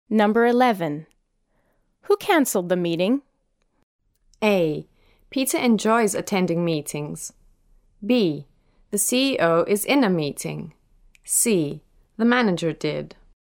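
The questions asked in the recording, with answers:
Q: Who cancelled the meeting?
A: C: The manager did.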